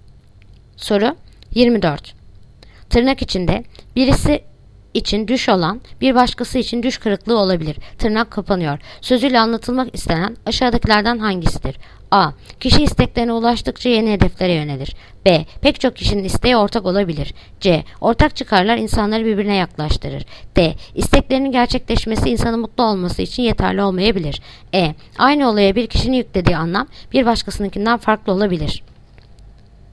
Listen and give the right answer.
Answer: Yanıt: Edirne. Aynı olaya bir kişinin yüklediği anlam bir başkasınınkinden farklı olabilir.